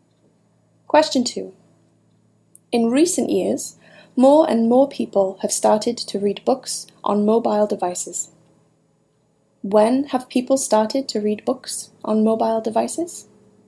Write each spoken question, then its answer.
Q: When have people started to read books on mobile devices?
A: People have started to read books on mobile devices in recent years.